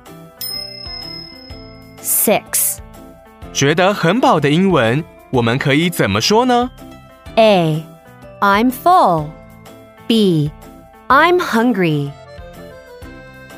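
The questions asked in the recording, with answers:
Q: 觉得很饱的英文。我们可以怎么说呢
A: A: I'm full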